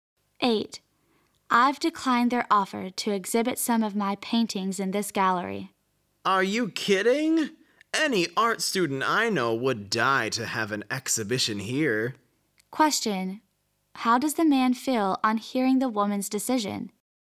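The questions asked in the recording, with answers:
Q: How does the man feel on hearing the woman's decision?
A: Surprised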